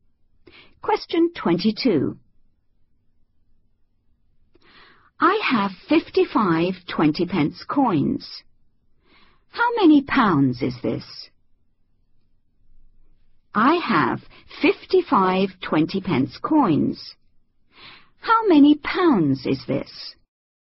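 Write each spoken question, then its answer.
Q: How many pounds is this?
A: £11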